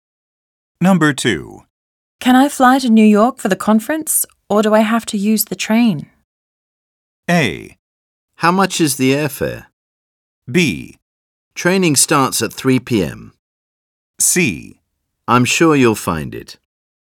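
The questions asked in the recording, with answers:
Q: Can I fly to New York for the conference, or do I have to use the train?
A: A: How much is the airfare?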